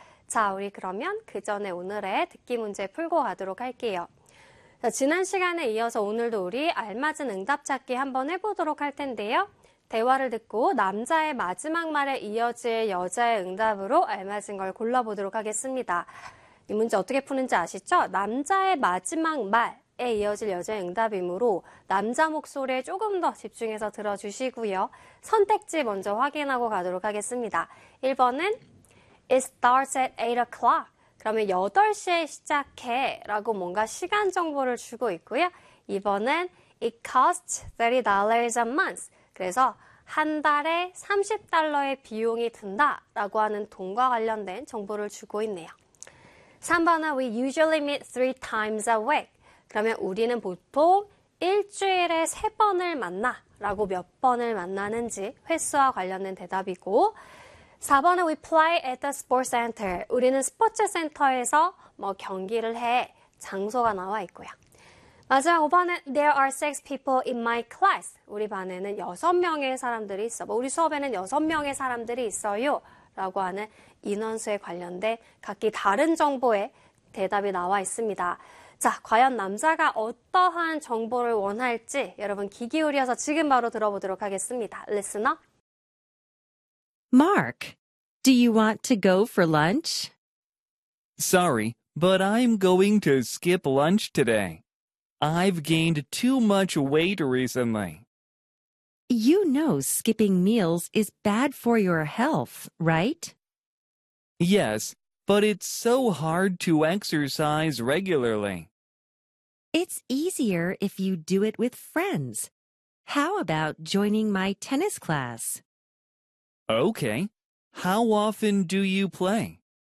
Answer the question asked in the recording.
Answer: We usually meet three times a week.